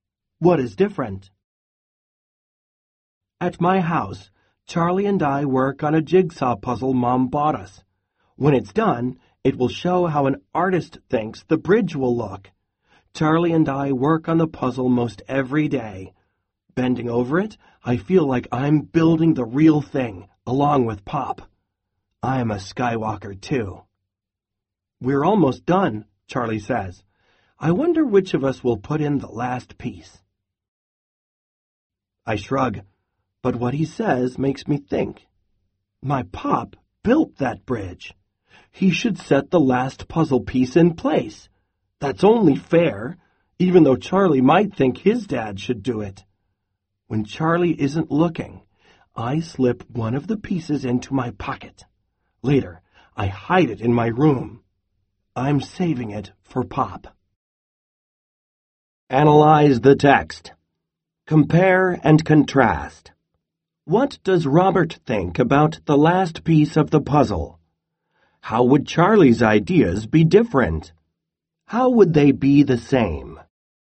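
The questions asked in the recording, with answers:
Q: What does Robert think about the last piece of the puzzle?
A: His pop should put it in because he built the bridge, so Robert hides a piece to save for him.

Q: How would Charlie's ideas be different?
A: Charlie might think his own dad should put in the last piece.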